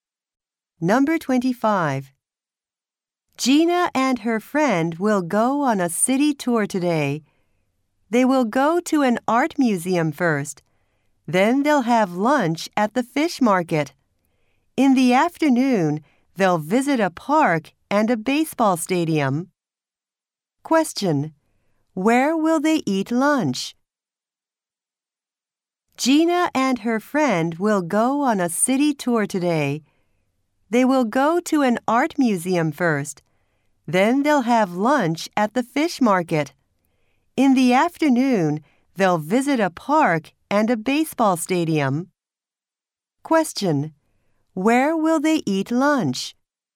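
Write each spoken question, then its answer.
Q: Where will they eat lunch?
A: At the fish market.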